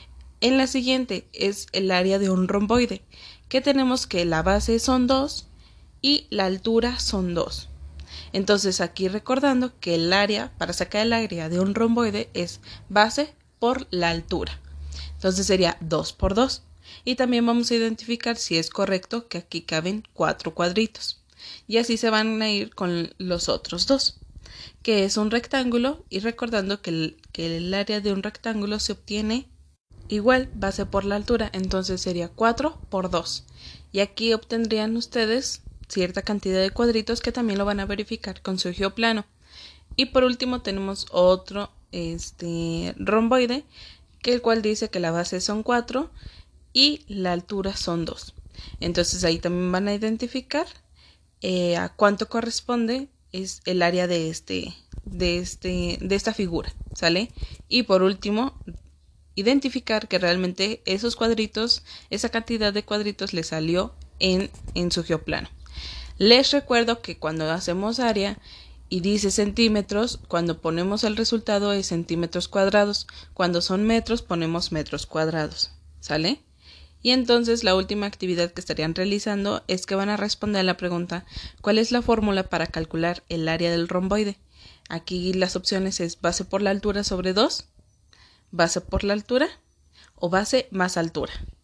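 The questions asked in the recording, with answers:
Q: ¿cuál es la fórmula para calcular el área del romboide?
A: base por la altura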